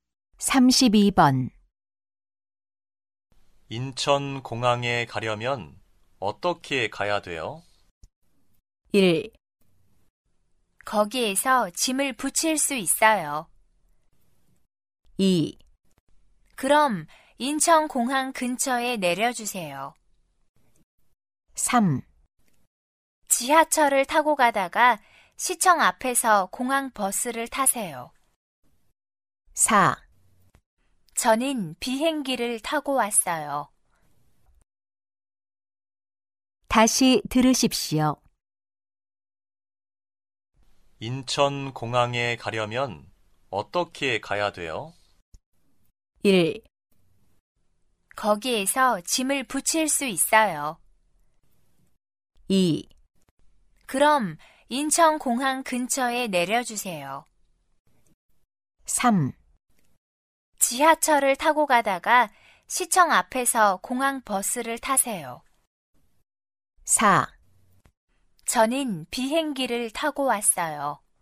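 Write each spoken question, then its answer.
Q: 인천 공항에 가려면 어떻게 가야 돼요?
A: 3: 지하철을 타고 가다가 시청 앞에서 공항 버스를 타세요.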